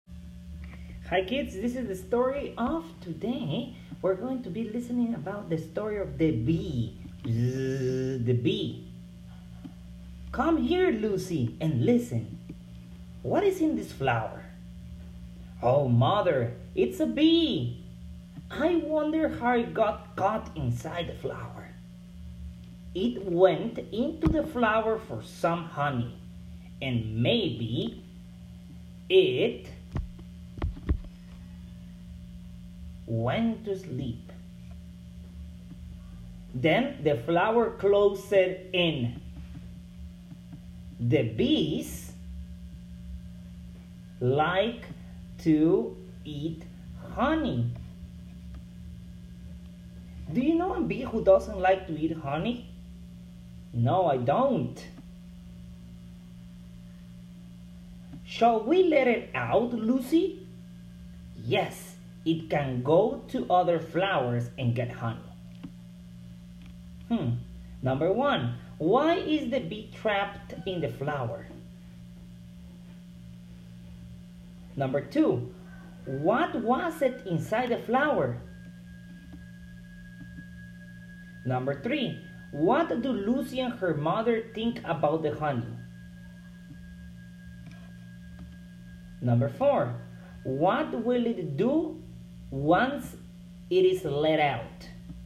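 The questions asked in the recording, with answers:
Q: Number one, why is the bee trapped in the flower?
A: It went in for honey, maybe fell asleep, and the flower closed

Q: Number two, what was it inside the flower?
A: A bee

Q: Number four, what will it do once it is let out?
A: Go to other flowers and get honey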